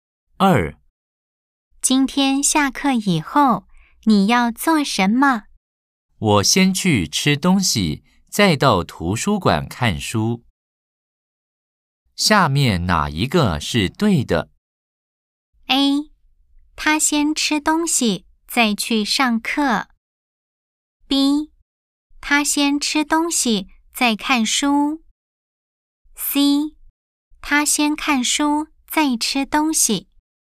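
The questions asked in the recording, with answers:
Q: 下面哪一个是对的?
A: B: 他先吃东西,再看书。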